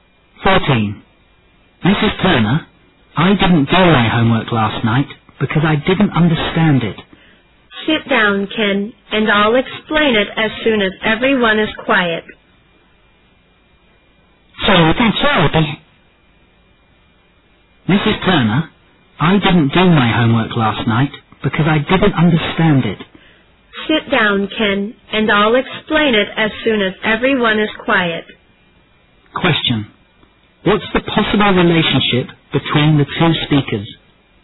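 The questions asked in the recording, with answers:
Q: What's the possible relationship between the two speakers?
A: Teacher and student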